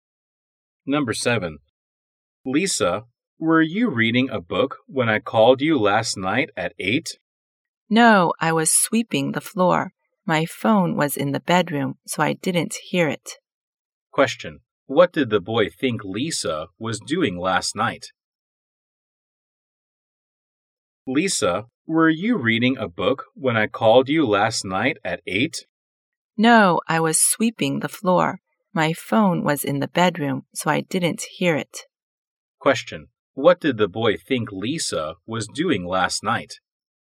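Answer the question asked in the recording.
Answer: Reading a book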